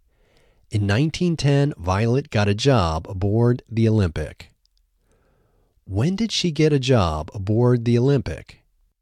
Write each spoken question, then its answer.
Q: When did she get a job aboard the Olympic?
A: She got a job aboard the Olympic in 1910.